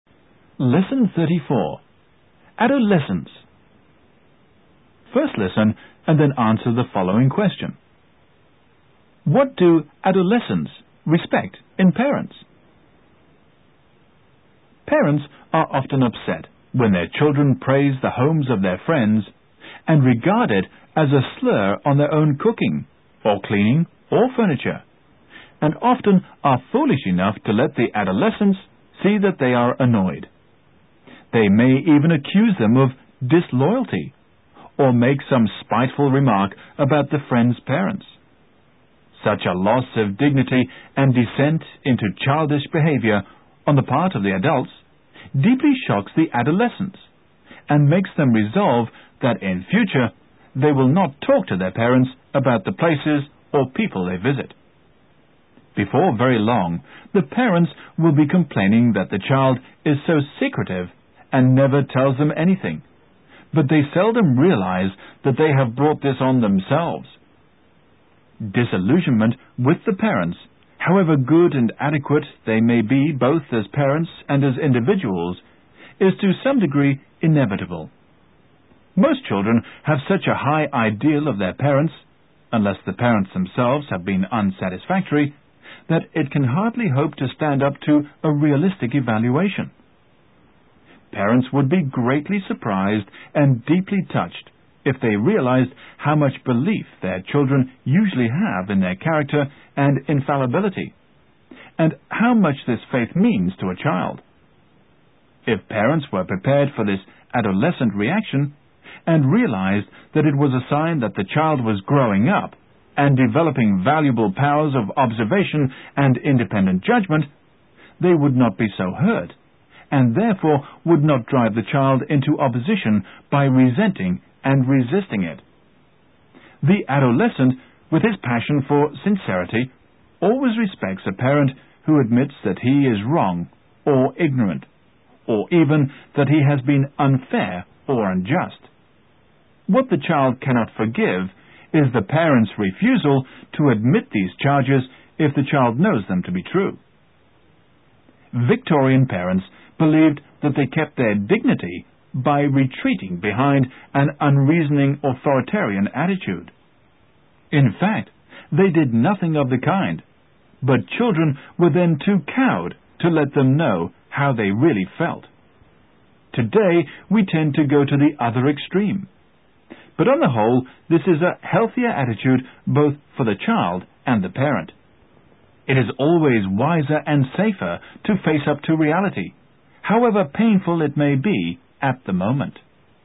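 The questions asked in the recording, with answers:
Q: What do adolescents respect in parents?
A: A parent who admits that he is wrong or ignorant, or even unfair or unjust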